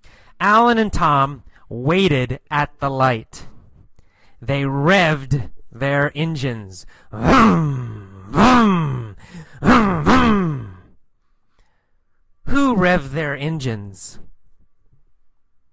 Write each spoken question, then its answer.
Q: Who revved their engines?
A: Alan and Tom. Alan and Tom revved their engines.